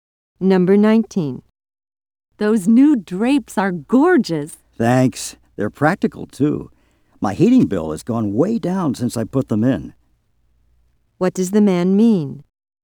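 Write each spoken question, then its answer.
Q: What does the man mean?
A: The drapes have lowered his heating bill.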